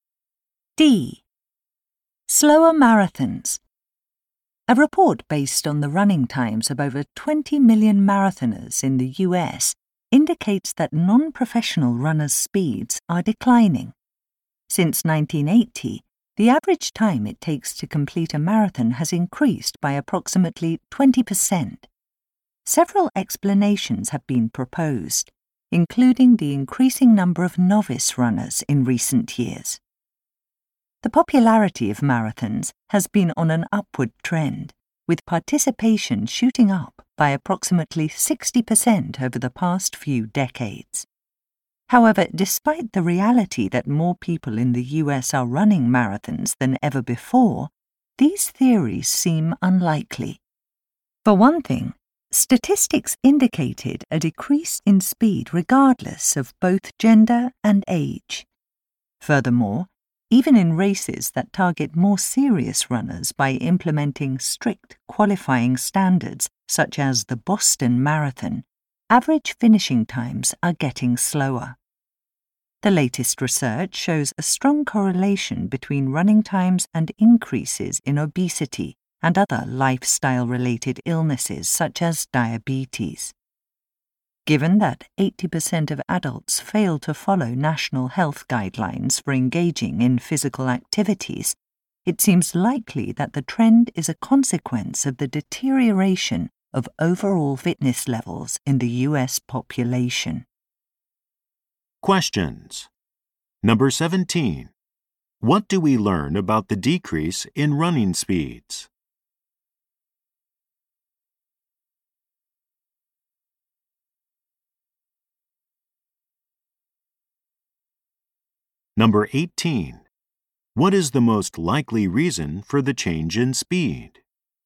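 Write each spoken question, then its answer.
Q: What do we learn about the decrease in running speeds?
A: It affects runners of all genders and ages, even serious runners.

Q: What is the most likely reason for the change in speed?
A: Declining overall fitness levels in the US population.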